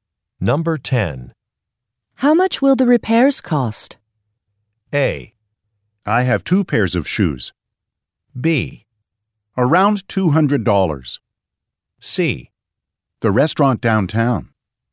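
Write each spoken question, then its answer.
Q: How much will the repairs cost?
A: B: Around $200.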